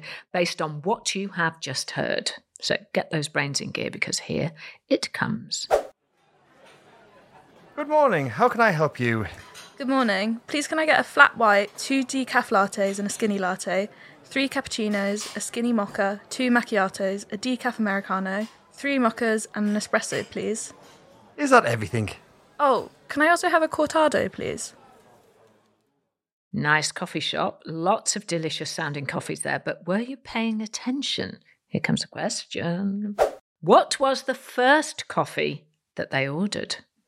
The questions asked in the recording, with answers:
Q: What was the first coffee that they ordered?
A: And the answer is a flat white coffee.